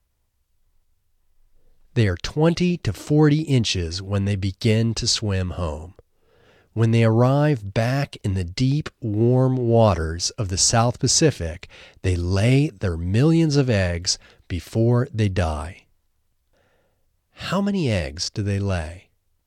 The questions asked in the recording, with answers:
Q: How many eggs do they lay?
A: They lay millions of eggs.